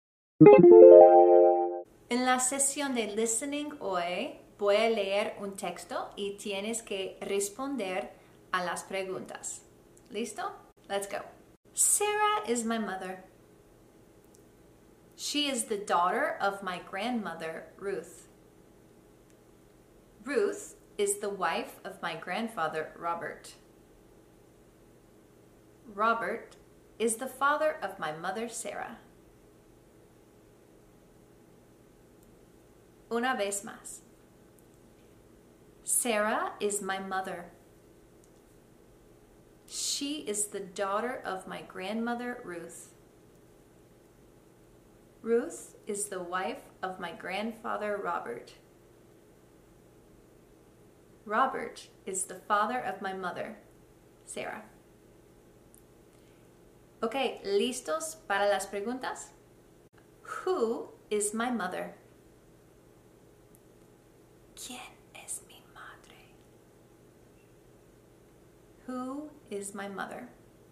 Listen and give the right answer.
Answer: Sarah is my mother.